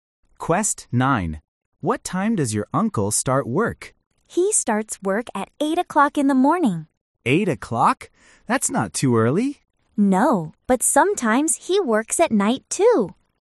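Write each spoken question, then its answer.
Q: What time does your uncle start work?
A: 8 o'clock in the morning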